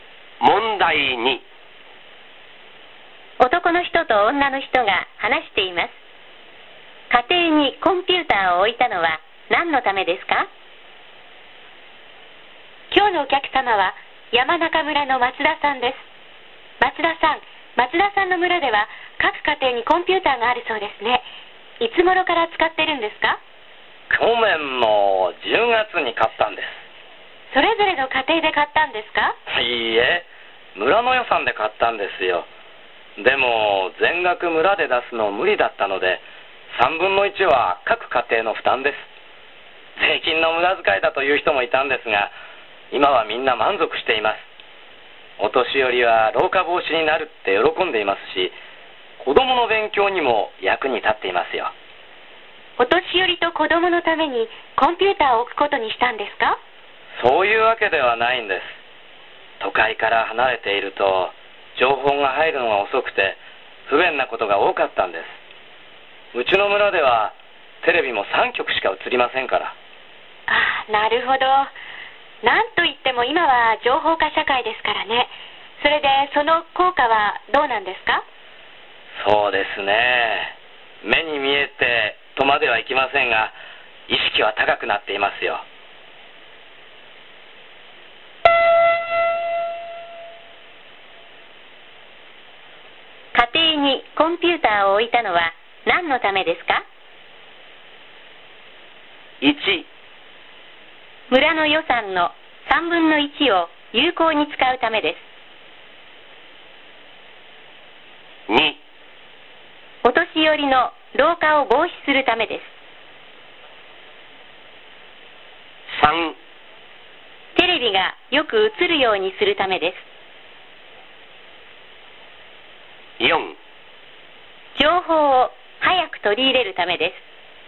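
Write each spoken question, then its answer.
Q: 家庭にコンピューターを置いたのは何のためですか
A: 4: 情報を早く取り入れるためです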